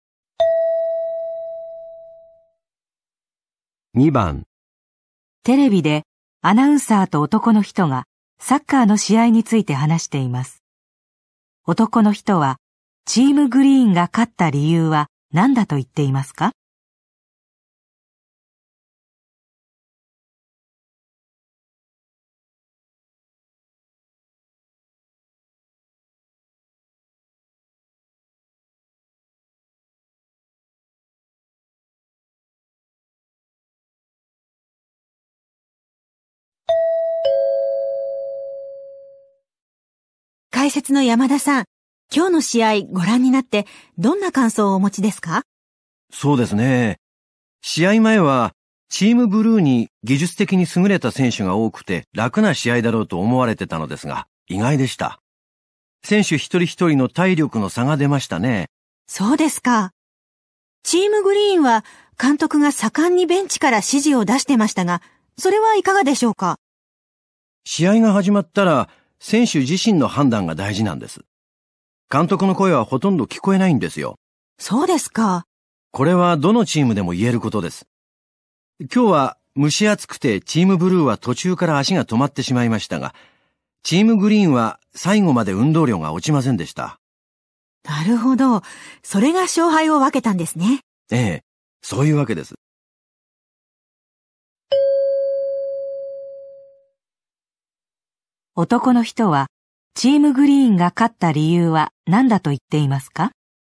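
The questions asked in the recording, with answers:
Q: 男の人は、チームグリーンが勝った理由は何だと言っていますか?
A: 最後まで運動量が落ちなかった(体力の差)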